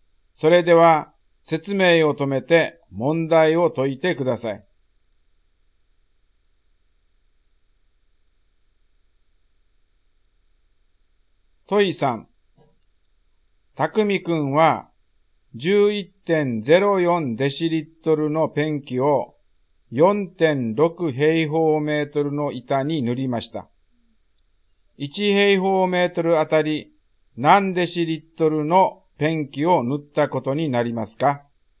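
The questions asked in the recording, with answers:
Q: 1平方メートルあたり何デシリットルのペンキを塗ったことになりますか?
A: 2.4デシリットル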